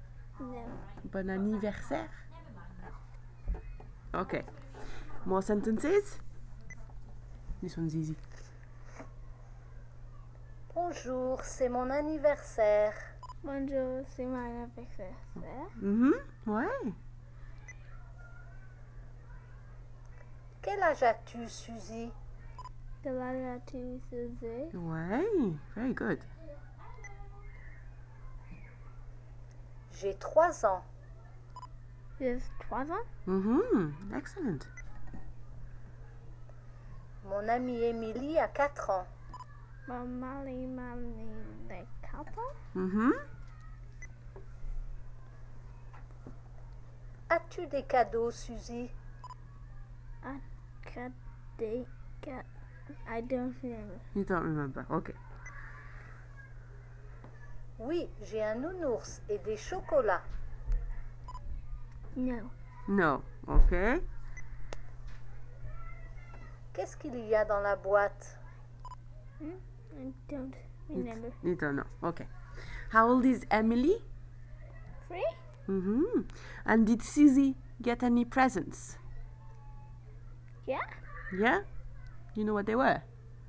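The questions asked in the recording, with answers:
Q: And did Susie get any presents?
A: Yes

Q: You know what they were?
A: A teddy bear and chocolates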